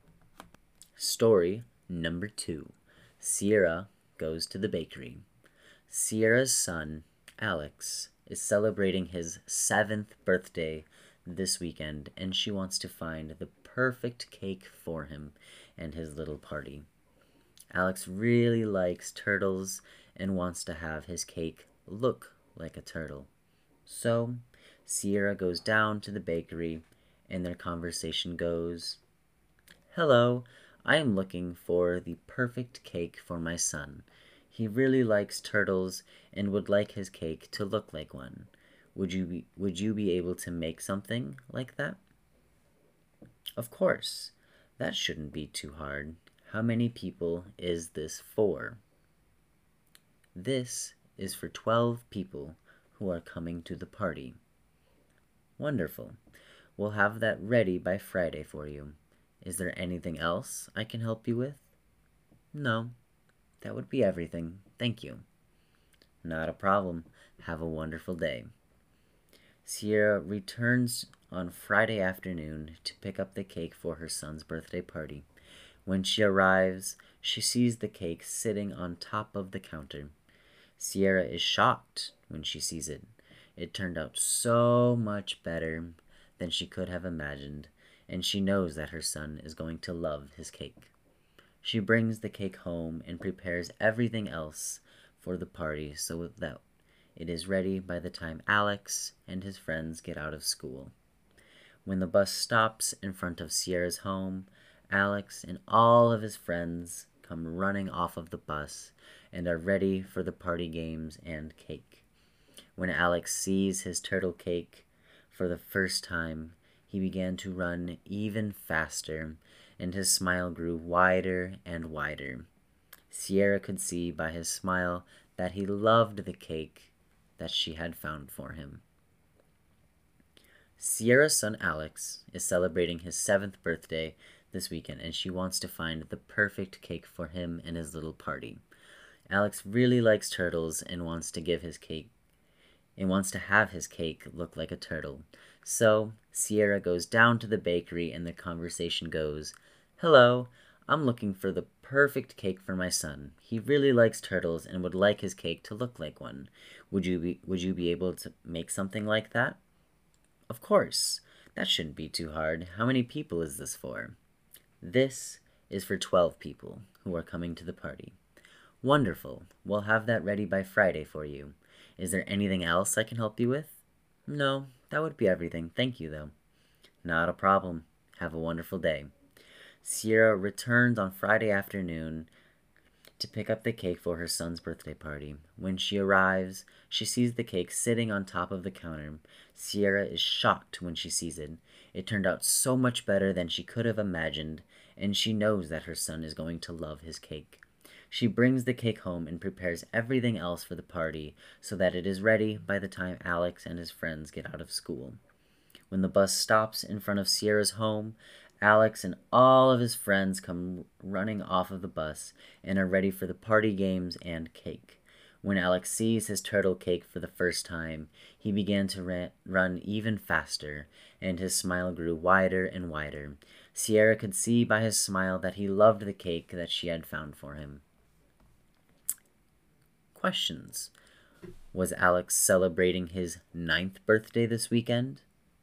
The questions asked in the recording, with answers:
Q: Was Alex celebrating his 9th birthday this weekend?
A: No. Alex was not celebrating his 9th birthday.